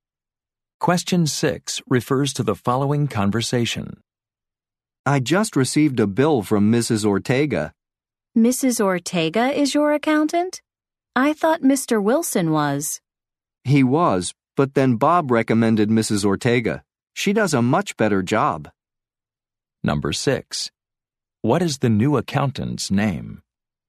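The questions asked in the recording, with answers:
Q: What is the new accountant's name?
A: Mrs. Ortega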